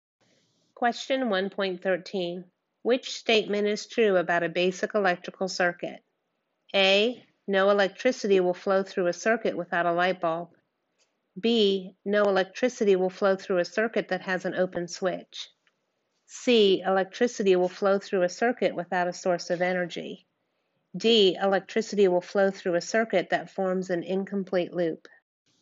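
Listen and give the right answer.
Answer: B: No electricity will flow through a circuit that has an open switch.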